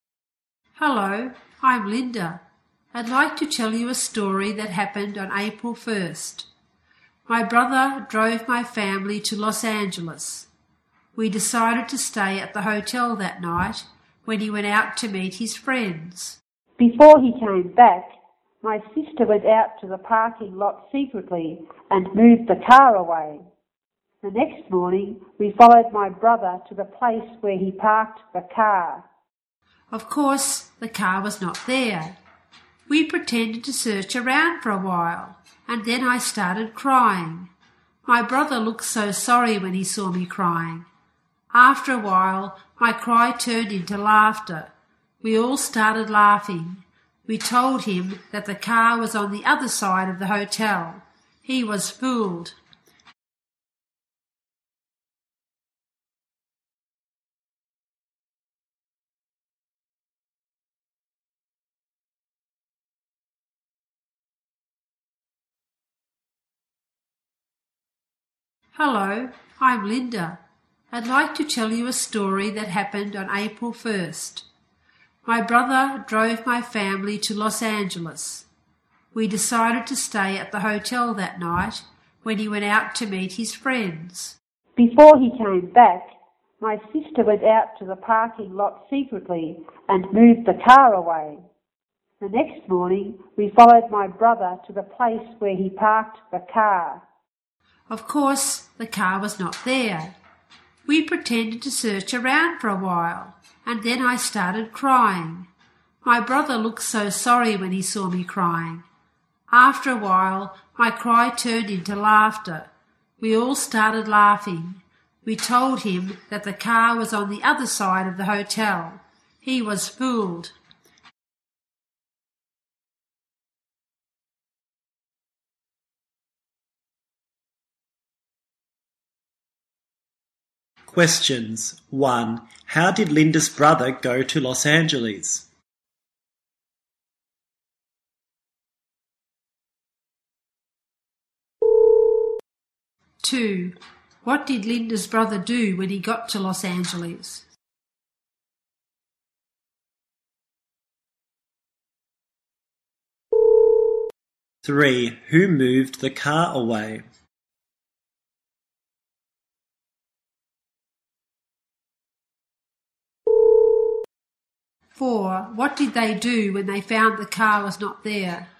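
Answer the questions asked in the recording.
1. He drove there.
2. He went out to meet his friends.
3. Linda's sister.
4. They pretended to search around, and Linda started crying.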